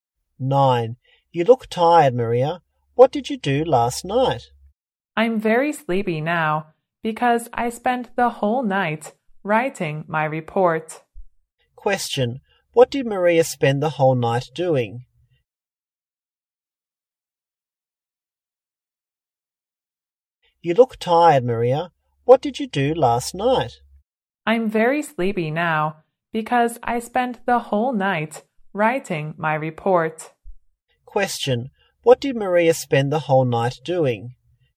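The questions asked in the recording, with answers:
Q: What did Maria spend the whole night doing?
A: Writing her report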